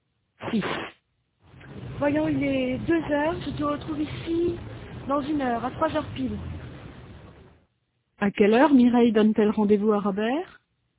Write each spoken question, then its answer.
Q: À quelle heure Mireille donne-t-elle rendez-vous à Robert?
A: À 3 heures pile.